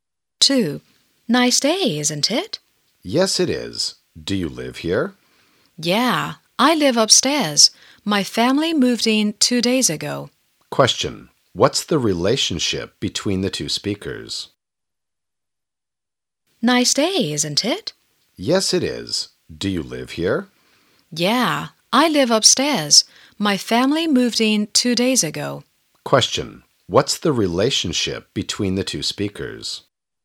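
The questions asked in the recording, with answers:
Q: What's the relationship between the two speakers?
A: Neighbours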